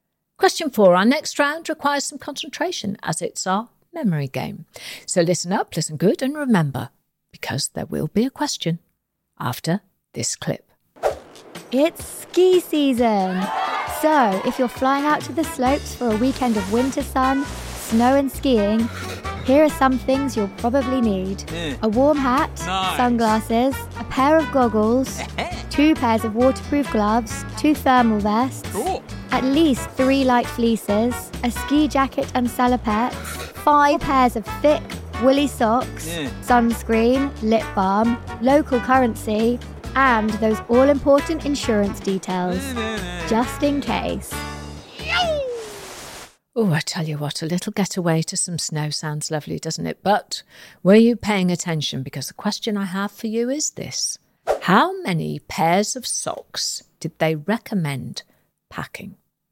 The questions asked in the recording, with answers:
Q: How many pairs of socks did they recommend packing?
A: The answer was five five pairs of thick, woolly socks.